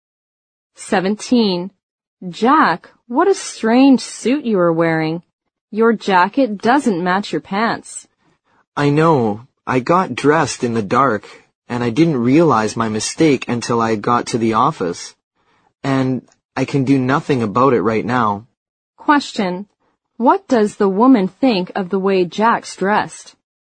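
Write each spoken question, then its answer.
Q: What does the woman think of the way Jack's dressed?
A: It looks strange; his jacket doesn't match his pants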